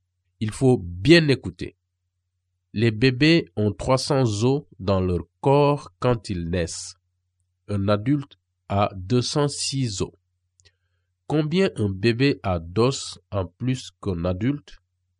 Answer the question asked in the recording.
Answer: Et la réponse, c'est 94.